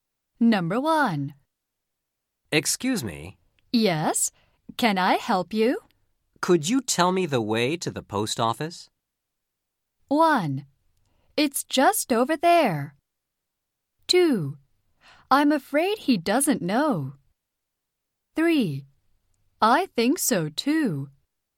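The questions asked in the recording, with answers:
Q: Could you tell me the way to the post office?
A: 1: It's just over there.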